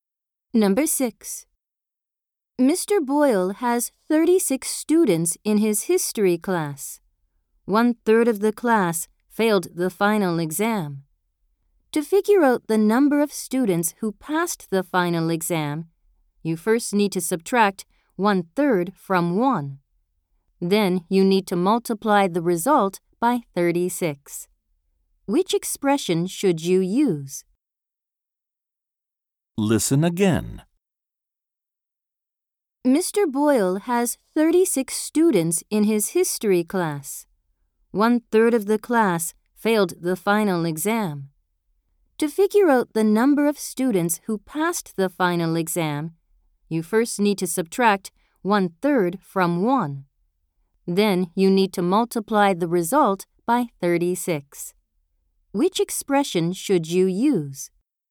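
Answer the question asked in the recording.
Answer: (1 − 1/3) × 36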